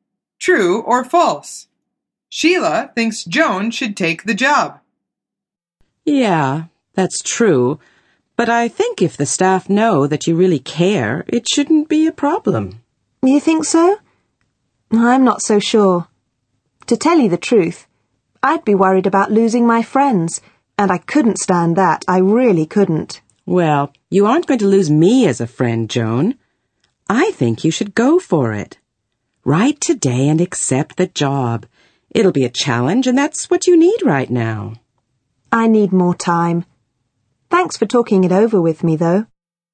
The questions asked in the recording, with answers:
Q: Sheila thinks Joan should take the job.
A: The answer is true.